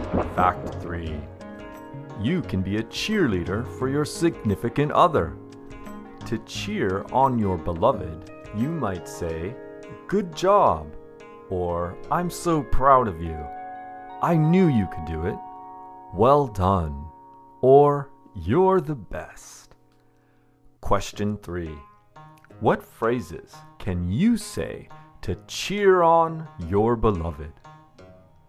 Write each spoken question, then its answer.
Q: What phrases can you say to cheer on your beloved.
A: Some phrases you might use to cheer on your beloved are good job, or I'm so proud of you, I knew you could do it, well done, or you're the best.